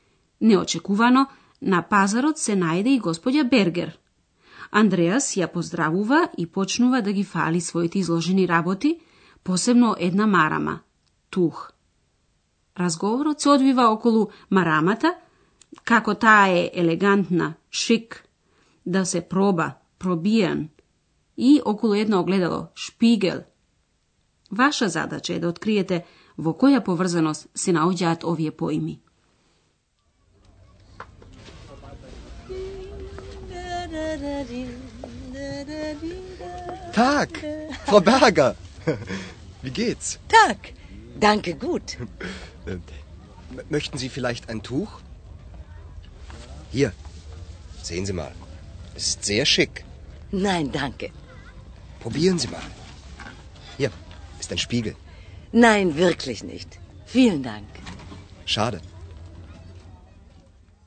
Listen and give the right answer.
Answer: Андреас ја фали марамата и вели дека е елегантна и сака да ја убеди господја Бергер да ја проба и да се огледа во огледалото.